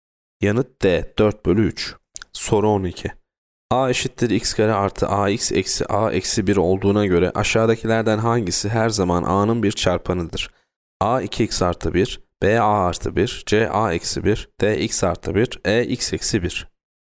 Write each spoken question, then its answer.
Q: A eşittir x kare artı AX eksi A eksi 1 olduğuna göre aşağıdakilerden hangisi her zaman A'nın bir çarpanıdır?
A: Yanıt E x eksi 1.